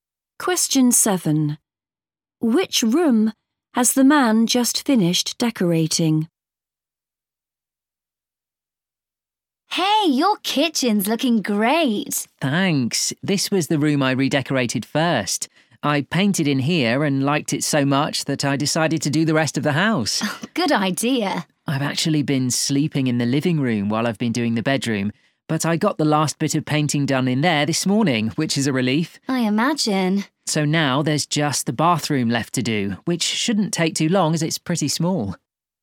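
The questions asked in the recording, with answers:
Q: Which room has the man just finished decorating?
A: The bedroom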